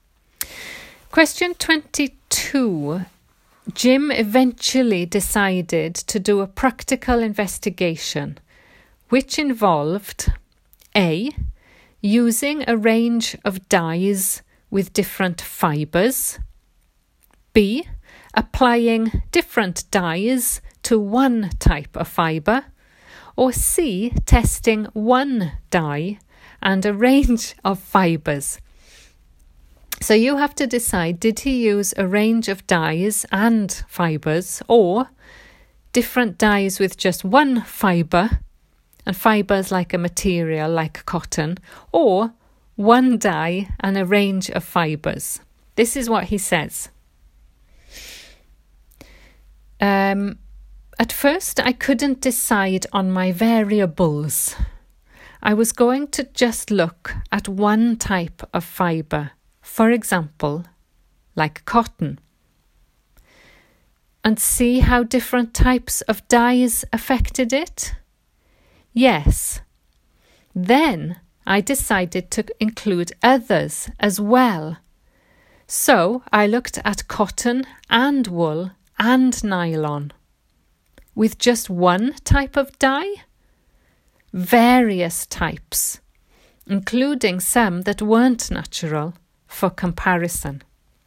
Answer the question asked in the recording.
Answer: So the answer is A, a range of dyes with different fibres.